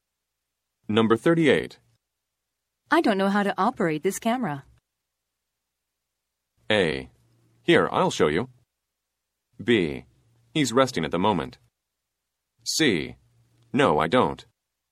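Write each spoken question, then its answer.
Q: I don't know how to operate this camera.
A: A: Here, I'll show you.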